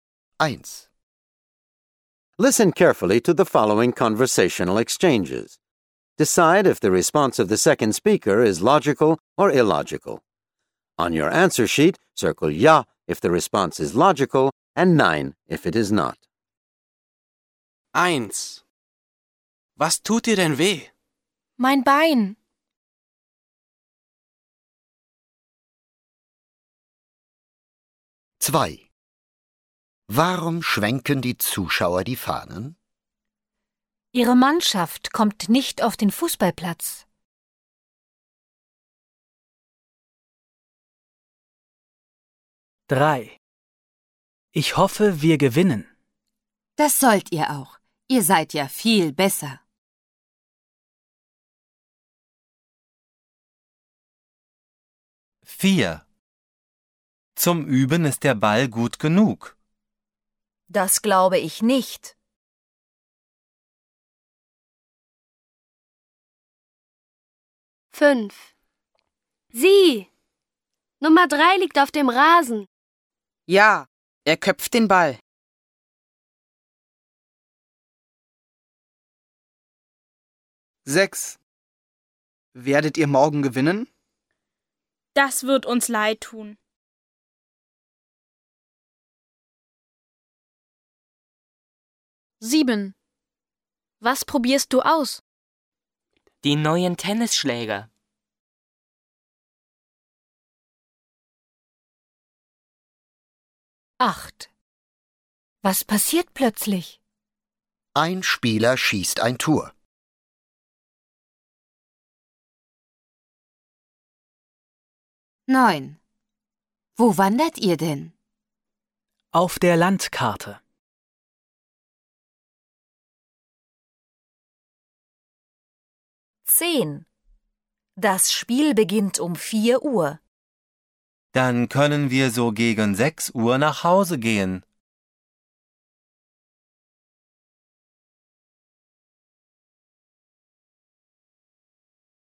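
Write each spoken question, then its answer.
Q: Was tut dir denn weh? Mein Bein.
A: ja

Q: Warum schwenken die Zuschauer die Fahnen? Ihre Mannschaft kommt nicht auf den Fußballplatz.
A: nein

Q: Ich hoffe, wir gewinnen. Das sollt ihr auch. Ihr seid ja viel besser.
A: ja

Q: Sieh, Nummer 3 liegt auf dem Rasen. Ja, er köpft den Ball.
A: nein

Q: Werdet ihr morgen gewinnen? Das wird uns leid tun.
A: nein

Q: Was probierst du aus? Die neuen Tennisschläger.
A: ja

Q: Was passiert plötzlich? Ein Spieler schießt ein Tor.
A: ja

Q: Wo wandert ihr denn? Auf der Landkarte.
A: nein

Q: Das Spiel beginnt um 4 Uhr. Dann können wir so gegen 6 Uhr nach Hause gehen.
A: ja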